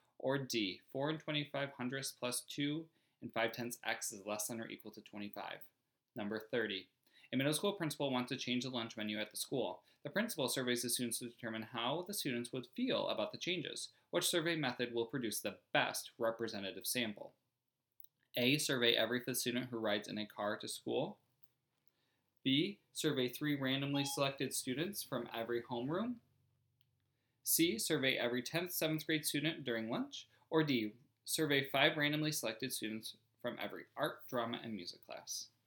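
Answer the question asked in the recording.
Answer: B: survey 3 randomly selected students from every homeroom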